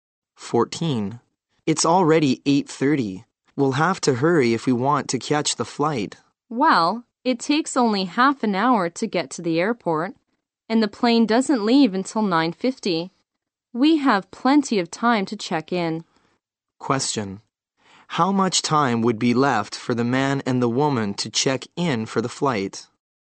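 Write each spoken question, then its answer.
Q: How much time would be left for the man and the woman to check in for the flight?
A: 50 minutes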